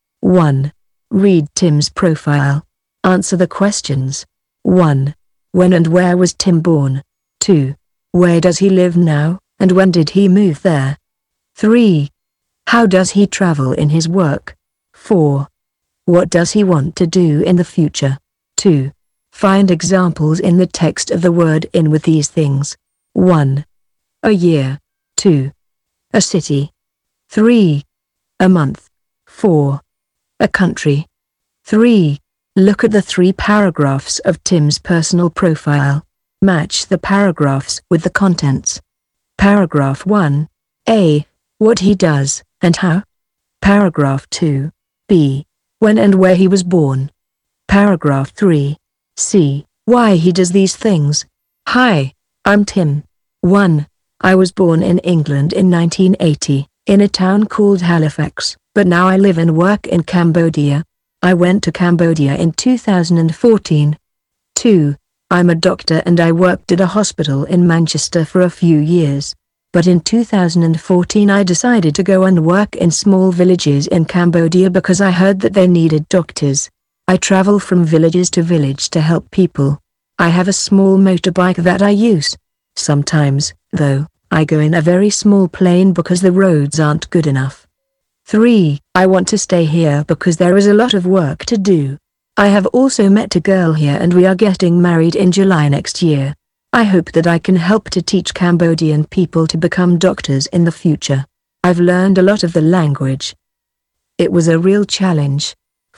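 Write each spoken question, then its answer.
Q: When and where was Tim born?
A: In 1980, in Halifax, England

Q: Where does he live now, and when did he move there?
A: In Cambodia; he moved there in 2014

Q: How does he travel in his work?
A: By small motorbike, and sometimes by a very small plane

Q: What does he want to do in the future?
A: Stay in Cambodia and help teach Cambodian people to become doctors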